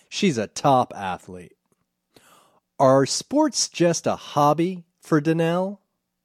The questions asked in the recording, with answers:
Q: Are sports just a hobby for Danielle?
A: No, sports aren't just a hobby.